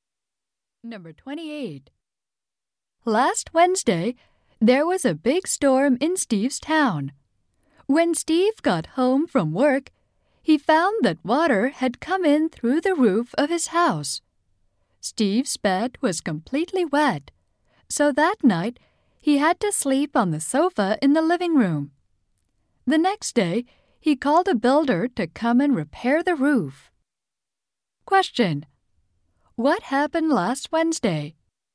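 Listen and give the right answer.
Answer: A storm caused water to come in through Steve's roof.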